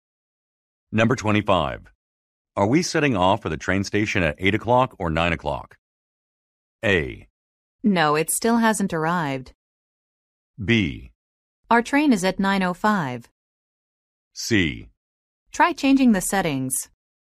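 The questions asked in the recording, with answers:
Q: Are we setting off for the train station at 8 o'clock or 9 o'clock?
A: B: Our train is at 9:05.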